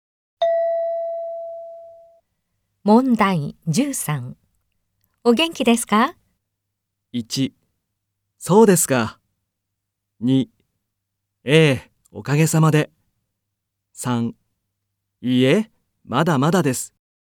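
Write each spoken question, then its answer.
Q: お元気ですか?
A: 1: ええ、おかげさまで。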